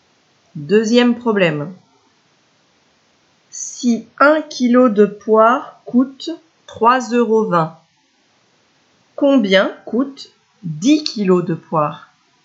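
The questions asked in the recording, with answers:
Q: Si 1 kg de poire coûte 3,20 €, combien coûte 10 kg de poire?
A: 32 €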